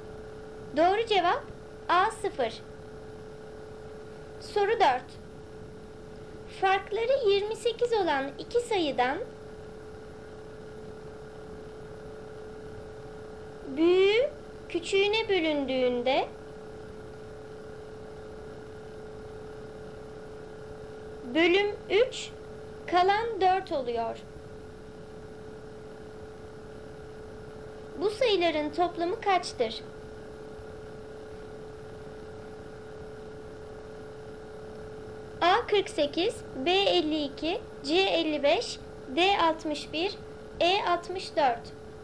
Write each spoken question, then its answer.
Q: Bu sayıların toplamı kaçtır?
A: Doğru cevap B 52.